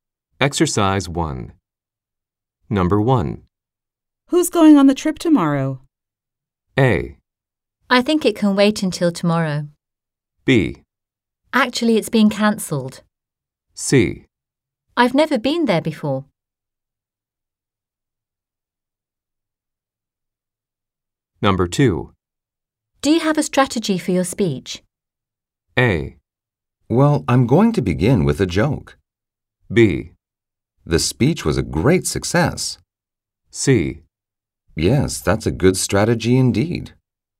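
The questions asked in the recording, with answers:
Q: Who's going on the trip tomorrow?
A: B: Actually, it's being cancelled.

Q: Do you have a strategy for your speech?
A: A: Well, I'm going to begin with a joke.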